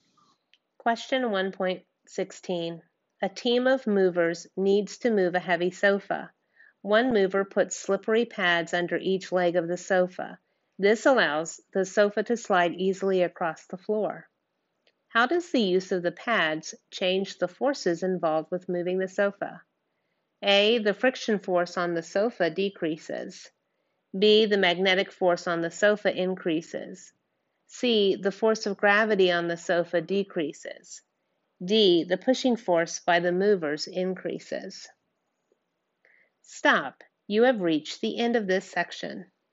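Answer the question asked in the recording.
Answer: A: The friction force on the sofa decreases.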